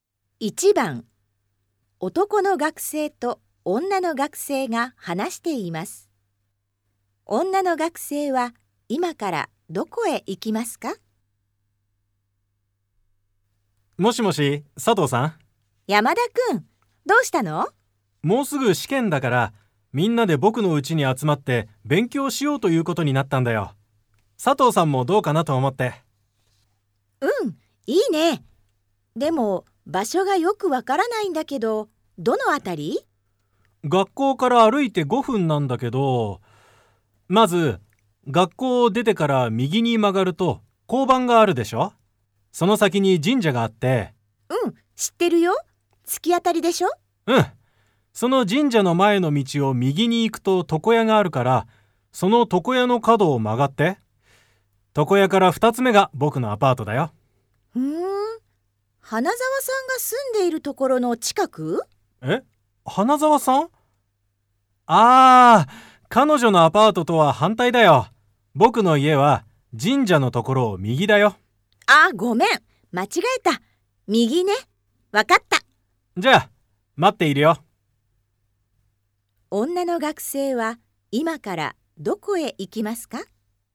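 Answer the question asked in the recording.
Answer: 山田君(男の学生)のアパート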